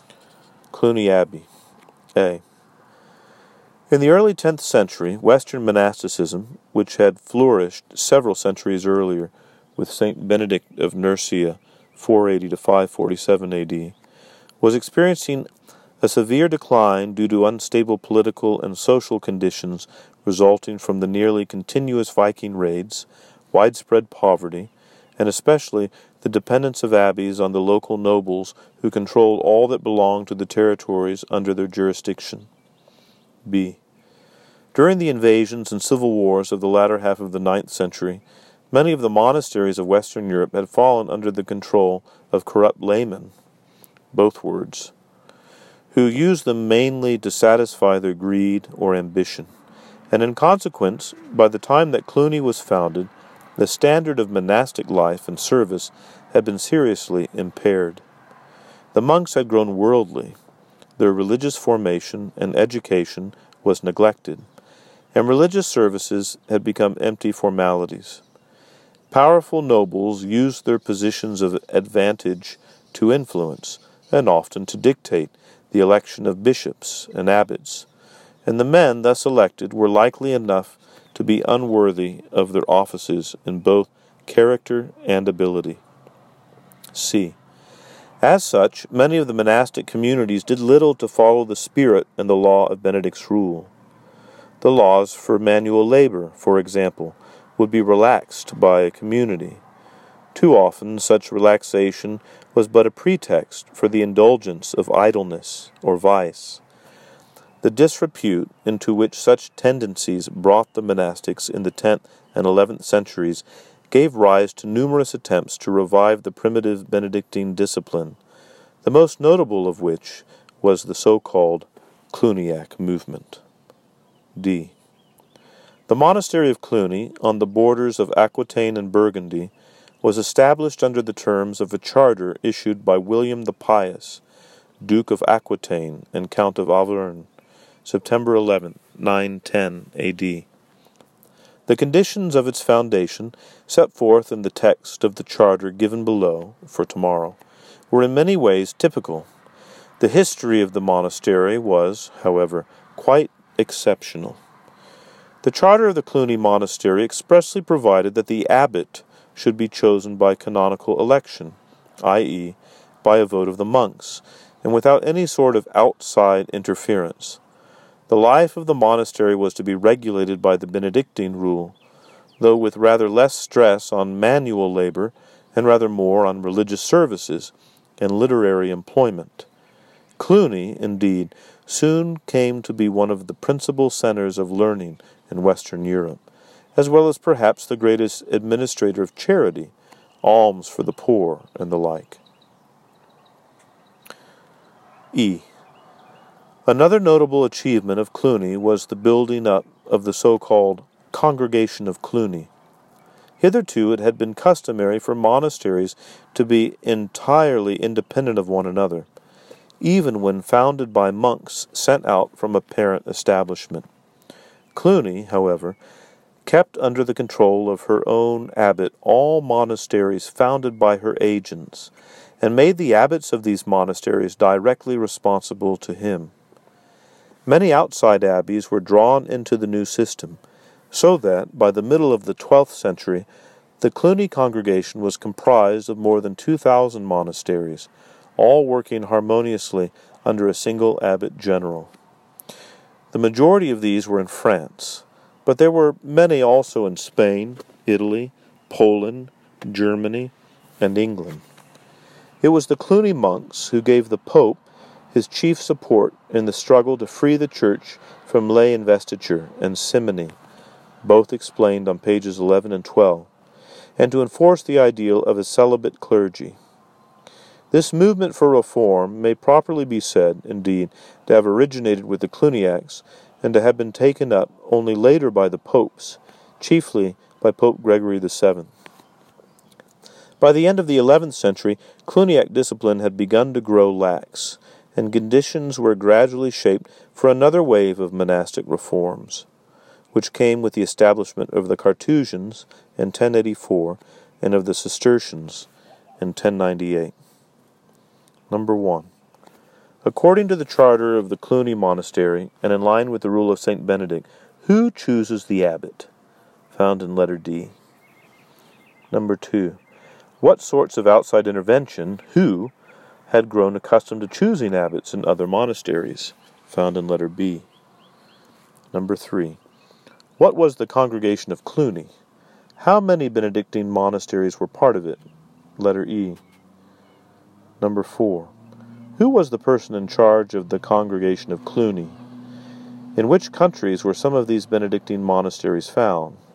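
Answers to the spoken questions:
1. The monks, by canonical election (a vote of the monks)
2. Powerful nobles / corrupt laymen
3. Monasteries founded or drawn in by Cluny, kept under the control of Cluny's abbot
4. More than 2,000
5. A single abbot general (the abbot of Cluny)
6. France, Spain, Italy, Poland, Germany, and England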